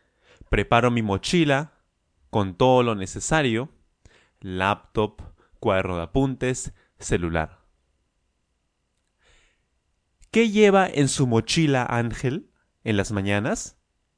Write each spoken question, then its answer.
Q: ¿Qué lleva en su mochila Ángel en las mañanas?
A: Claro, él lleva su laptop, cuaderno de apuntes, celular, etcétera, ¿no?